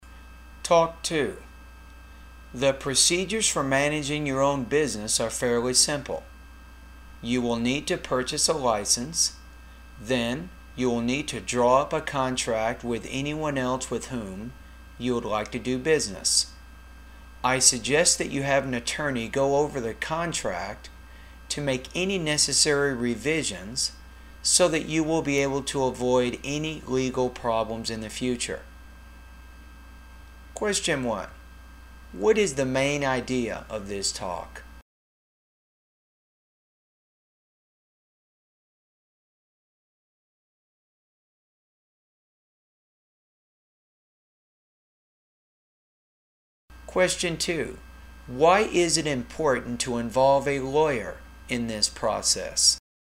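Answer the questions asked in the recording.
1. The simple procedures for managing your own business
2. So the lawyer can revise the contract and help avoid legal problems in the future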